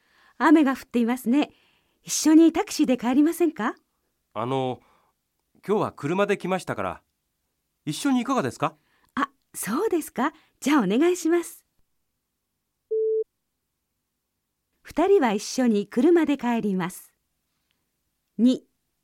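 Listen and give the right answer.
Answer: ○(正しい)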